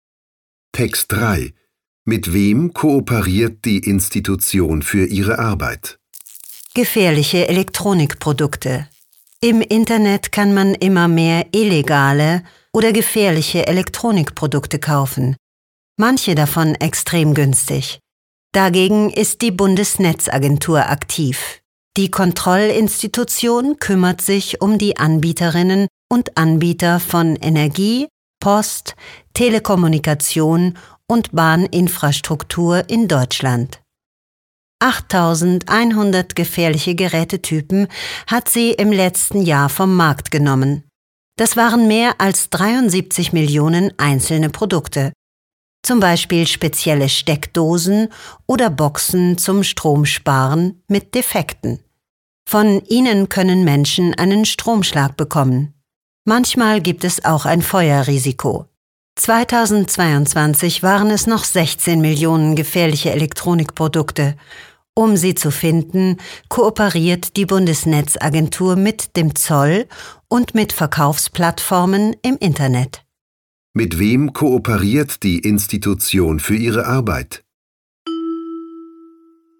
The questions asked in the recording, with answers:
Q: Mit wem kooperiert die Institution für ihre Arbeit?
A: Die Bundesnetzagentur kooperiert mit dem Zoll und mit Verkaufsplattformen im Internet, um gefährliche Geräte zu konfiszieren und vom Markt zu nehmen.